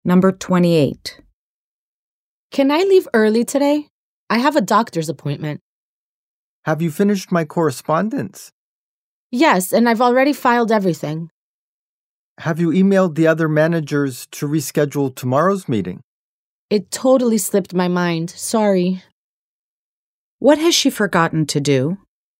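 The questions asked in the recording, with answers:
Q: What has she forgotten to do?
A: Email the other managers to reschedule tomorrow's meeting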